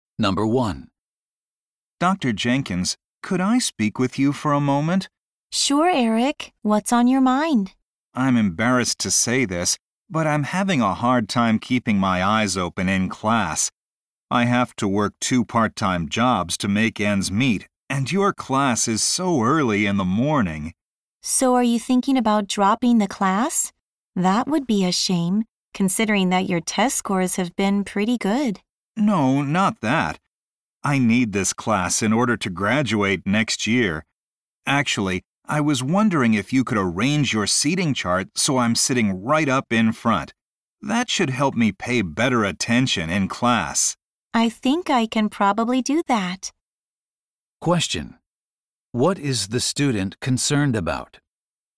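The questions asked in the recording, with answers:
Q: What is the student concerned about?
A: Staying awake in his early morning class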